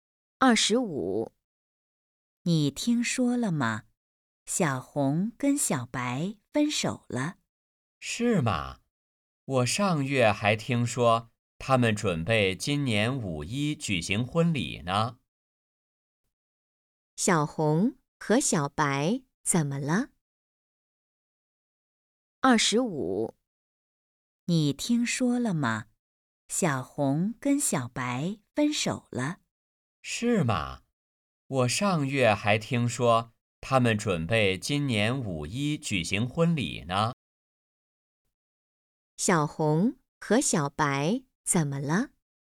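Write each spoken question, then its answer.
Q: 小红和小白怎么了?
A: 分手了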